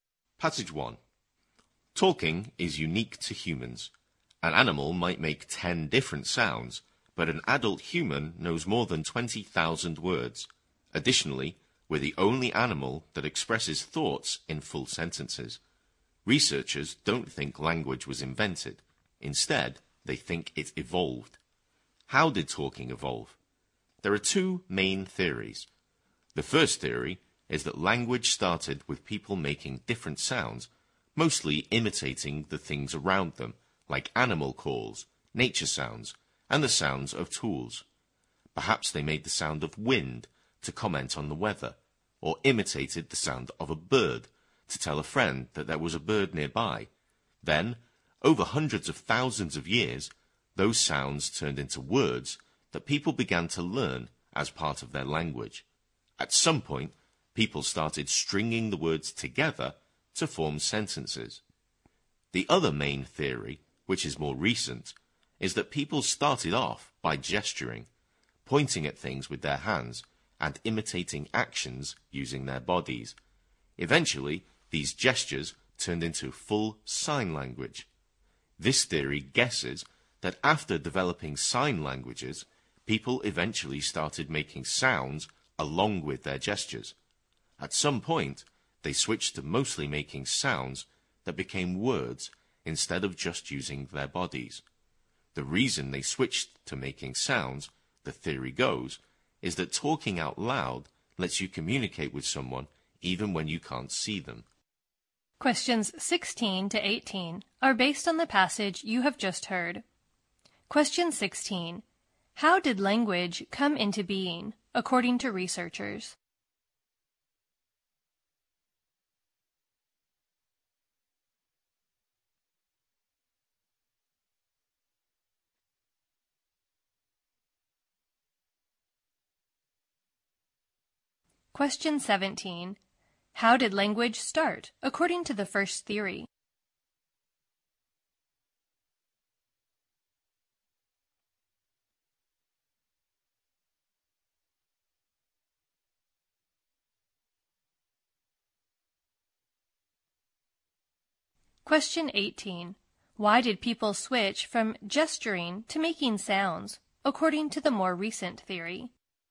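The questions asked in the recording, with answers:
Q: How did language come into being, according to researchers?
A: It evolved; it was not invented.

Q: How did language start, according to the first theory?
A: People made sounds copying things around them.

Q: Why did people switch from gesturing to making sounds, according to the more recent theory?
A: Talking lets you communicate with someone even when you can't see them.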